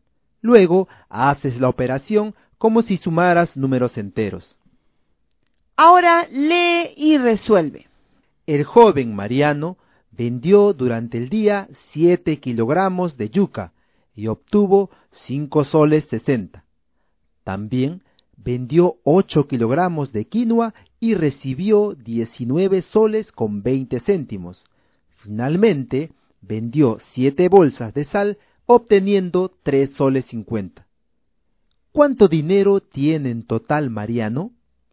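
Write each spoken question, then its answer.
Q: ¿Cuánto dinero tiene en total Mariano?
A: 28 soles 30 céntimos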